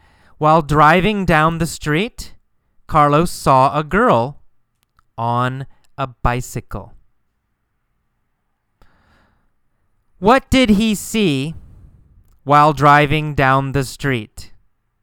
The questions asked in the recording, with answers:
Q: What did he see while driving down the street?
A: He saw a girl on a bicycle while driving down the street.